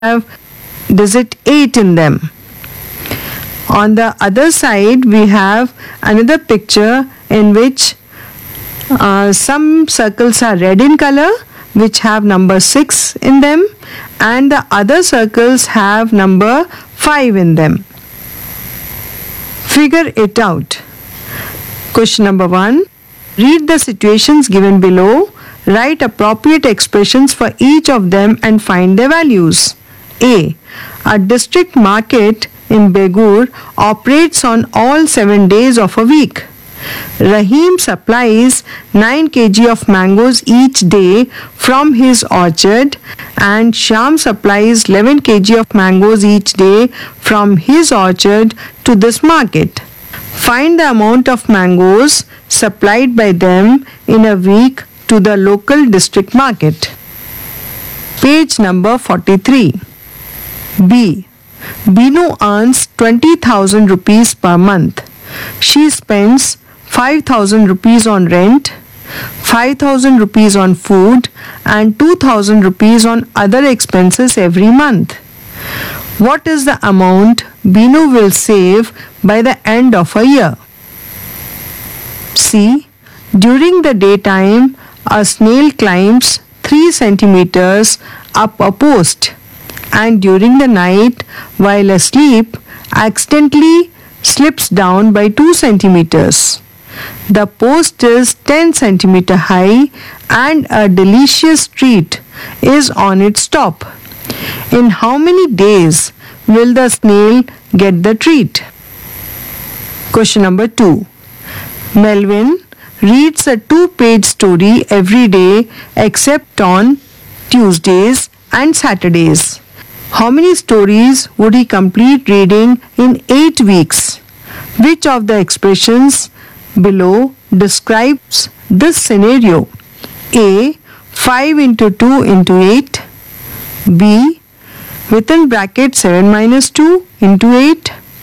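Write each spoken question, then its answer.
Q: Find the amount of mangoes supplied by them in a week to the local district market.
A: 140 kg

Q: What is the amount Binu will save by the end of a year?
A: 96,000 rupees

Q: In how many days will the snail get the treat?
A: 8 days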